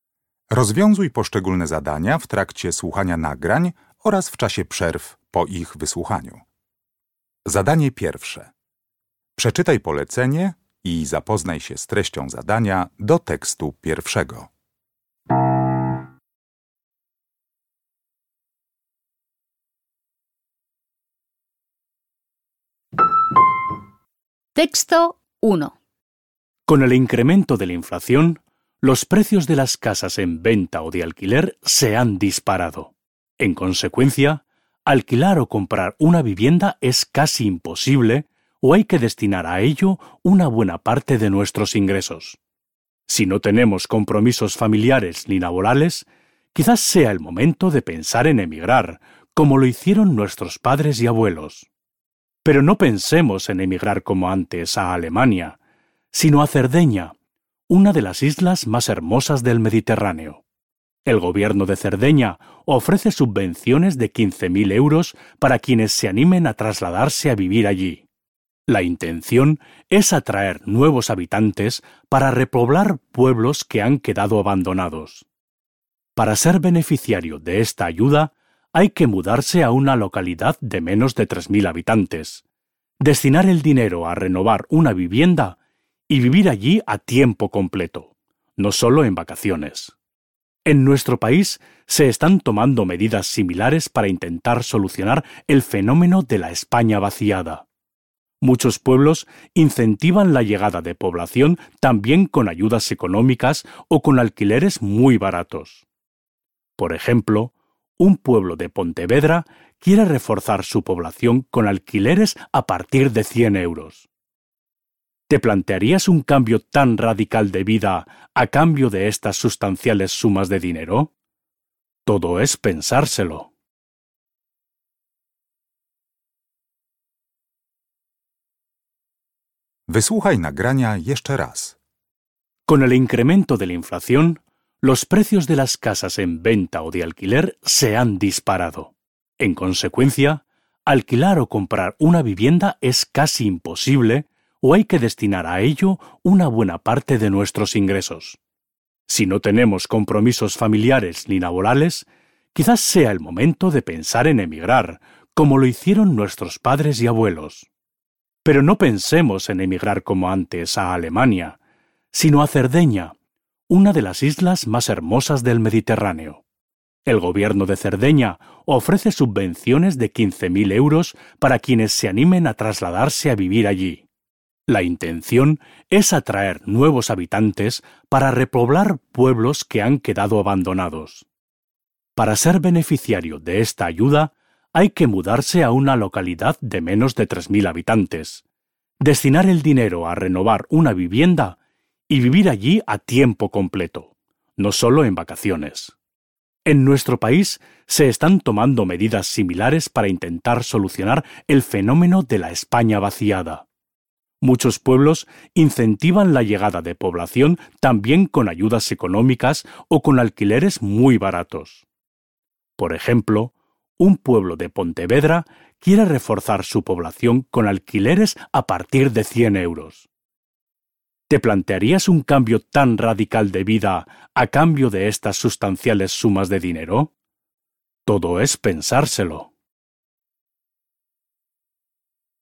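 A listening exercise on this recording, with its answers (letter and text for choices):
W zadaniach 1.1. i 1.2. zakreśl jedną z liter: A, B albo C.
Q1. Ambos proyectos, el de Cerdeña y el de Pontevedra, han sido creados como respuesta a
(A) la falta de viviendas en oferta.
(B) la crisis en el mercado laboral.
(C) la despoblación de algunas zonas.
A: (C) la despoblación de algunas zonas.

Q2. El hablante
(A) anima a considerar una solución inusual.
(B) duda de la eficacia de las medidas emprendidas.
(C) denuncia prácticas inapropiadas de las autoridades locales.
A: (A) anima a considerar una solución inusual.

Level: Poziom: rozszerzony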